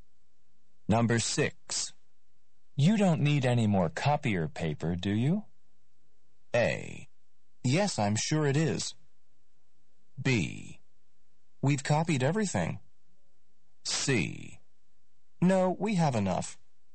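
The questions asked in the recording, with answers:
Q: You don't need any more copier paper, do you?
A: C: No, we have enough.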